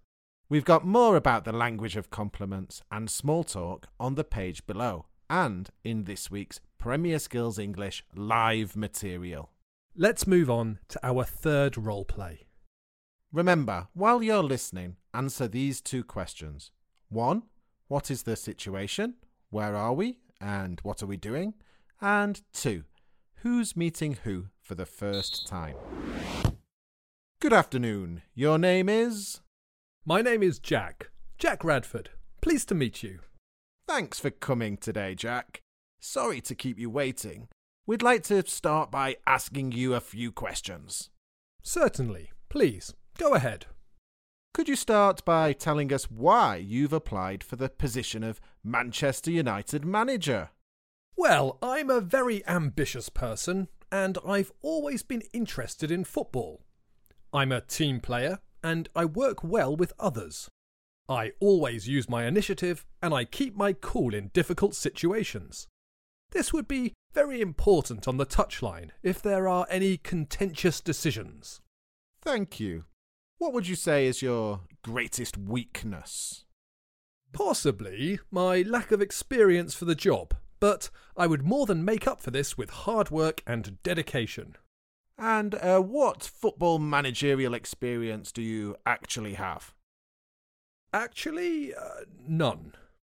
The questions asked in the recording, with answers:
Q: what is the situation?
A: The language of job interviews is usually formal